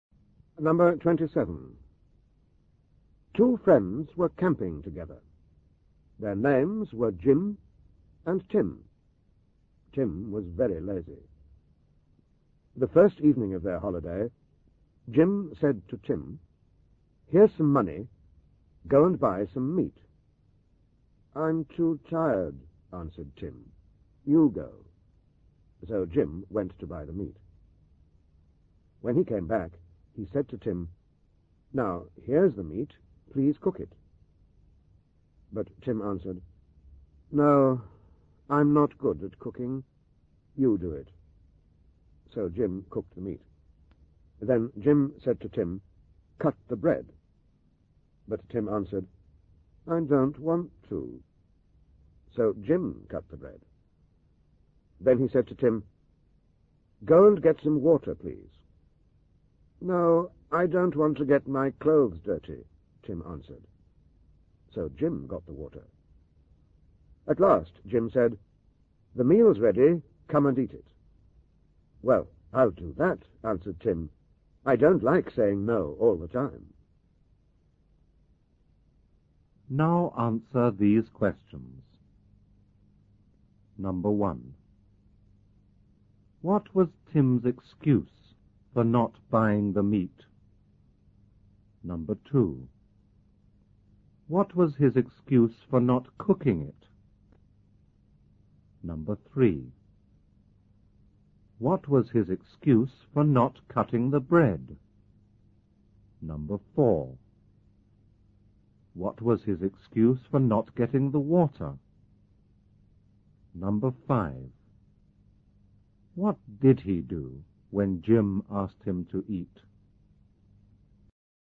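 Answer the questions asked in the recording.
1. He was too tired.
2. He wasn't good at cooking.
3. He didn't want to.
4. He didn't want to get his clothes dirty.
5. He agreed and ate the meal.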